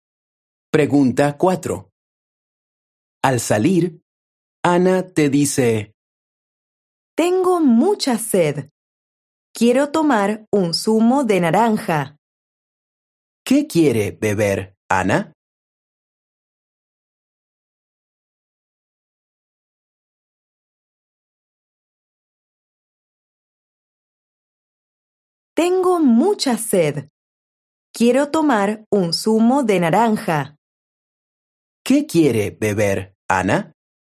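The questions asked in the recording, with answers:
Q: ¿Qué quiere beber, Ana?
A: Un zumo de naranja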